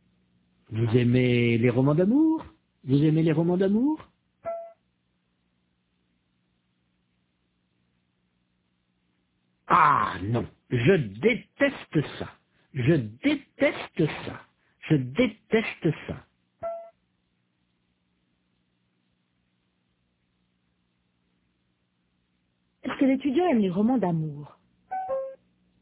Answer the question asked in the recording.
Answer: Non, il déteste ça.